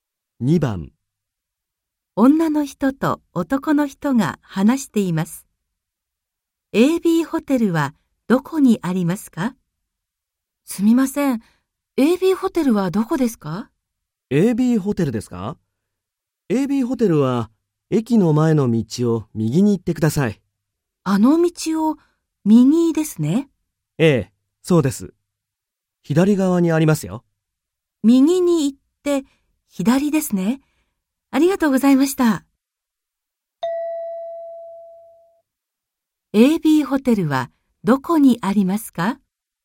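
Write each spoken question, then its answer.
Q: AB ホテルはどこにありますか?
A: 駅の前の道を右に行って、左側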